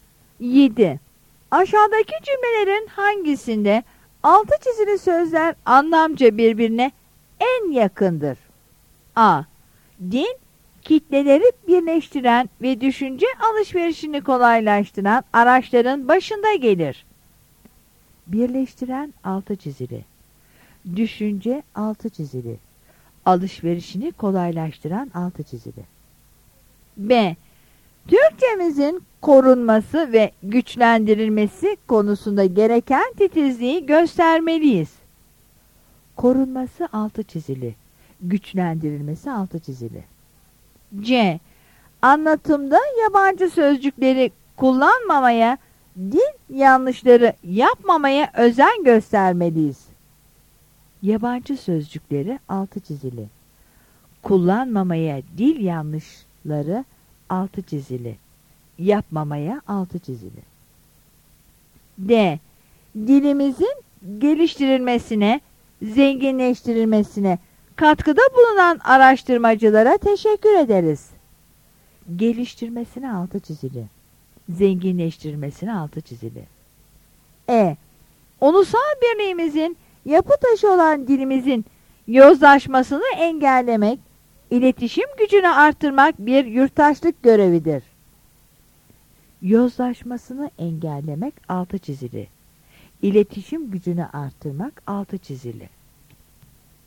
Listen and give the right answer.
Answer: Yanıt D'dir.